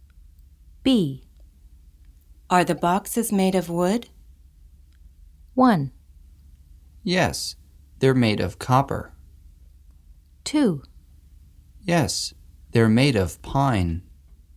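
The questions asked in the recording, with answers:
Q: Are the boxes made of wood?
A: 2: Yes, they're made of pine.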